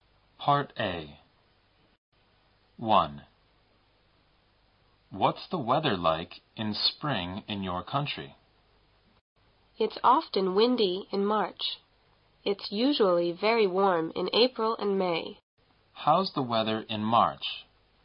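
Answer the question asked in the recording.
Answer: It's often windy.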